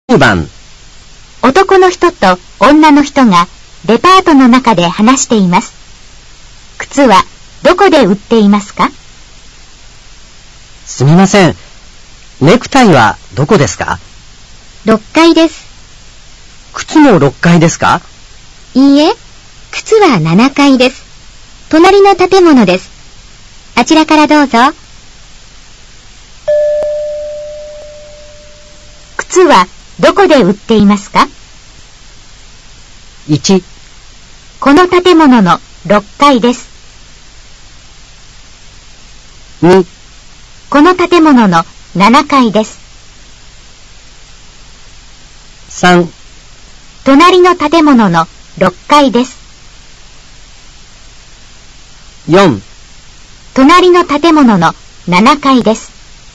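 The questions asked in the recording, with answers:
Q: 靴はどこで売っていますか?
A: 4: 隣の建物の7階です。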